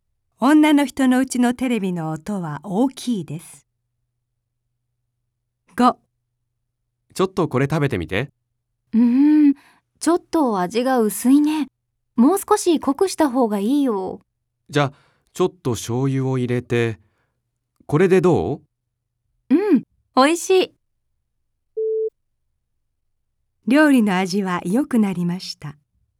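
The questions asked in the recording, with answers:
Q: 料理の味は良くなりました。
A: ○(正しい)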